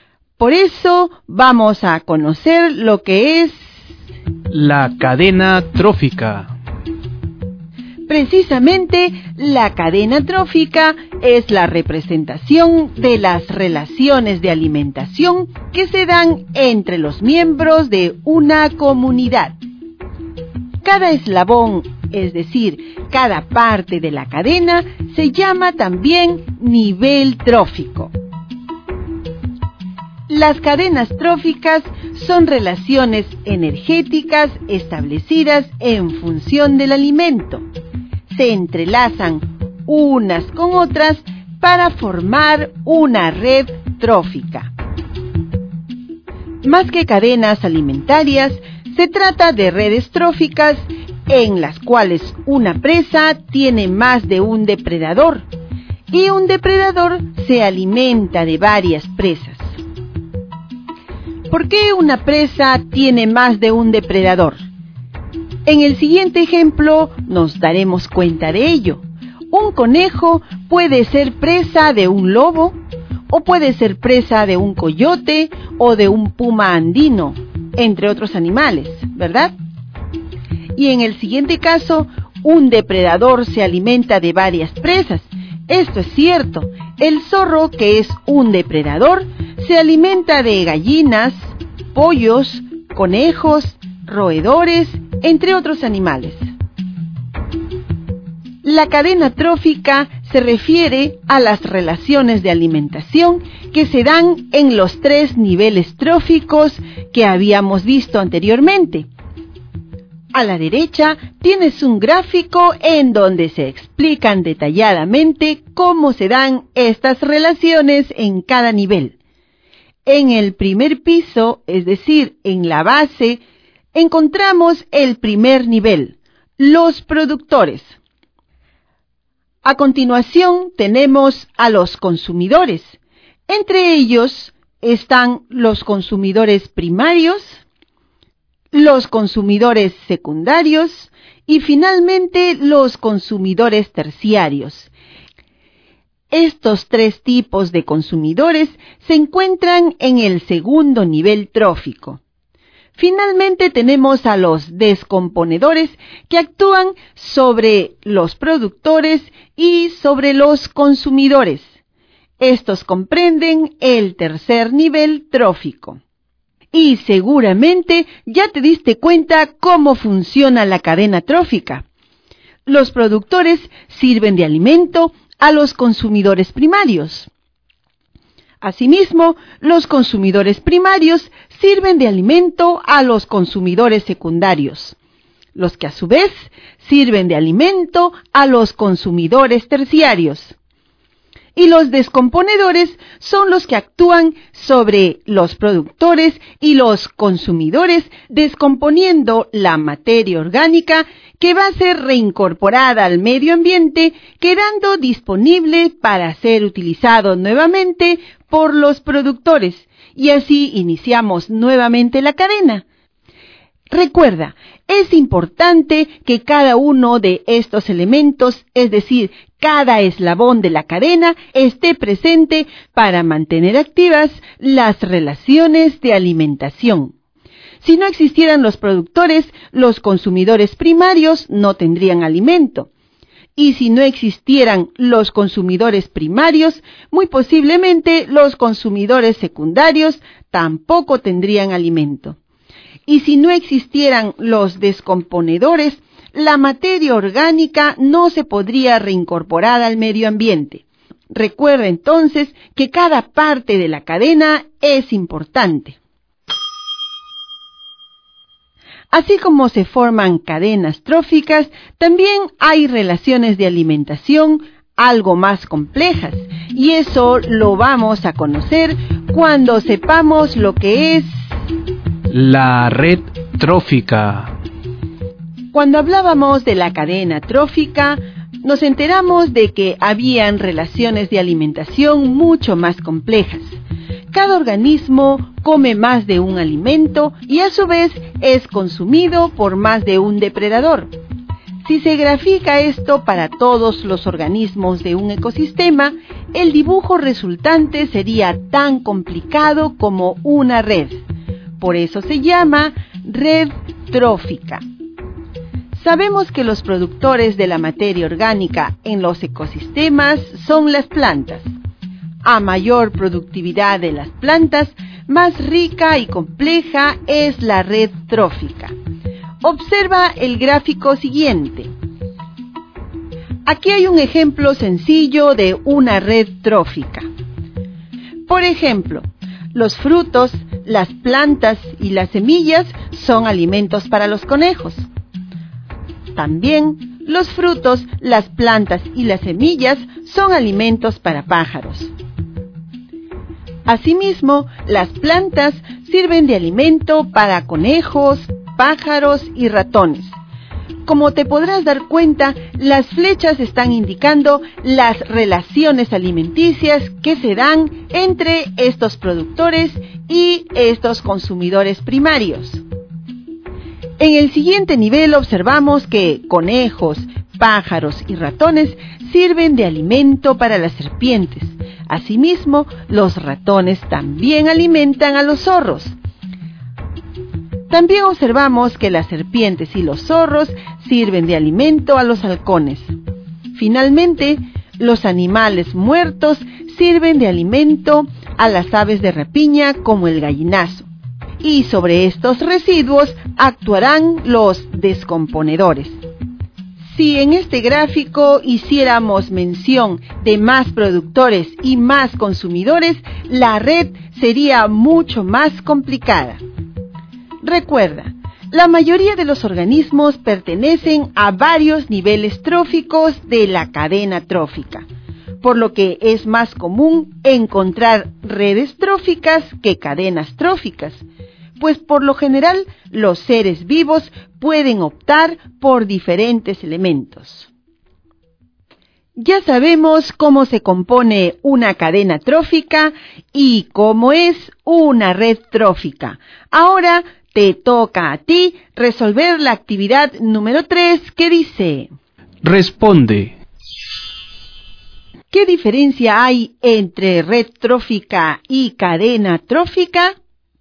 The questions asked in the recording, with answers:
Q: ¿Qué diferencia hay entre red trófica y cadena trófica?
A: Las cadenas tróficas son relaciones alimentarias que se dan de un nivel a otro.